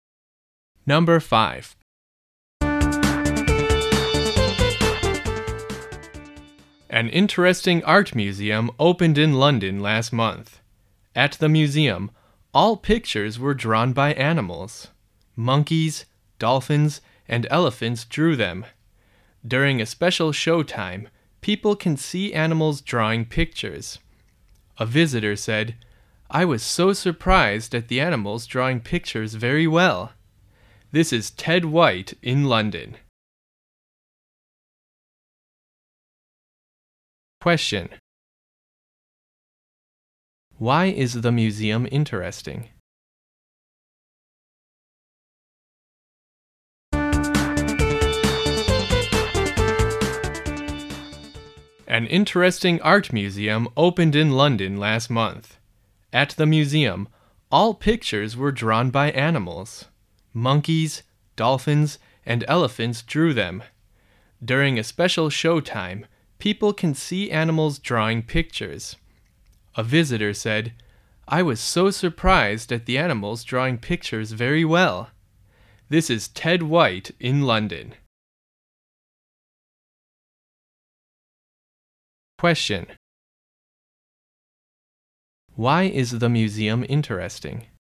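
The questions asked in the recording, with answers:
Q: Why is the museum interesting?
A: All the pictures were drawn by animals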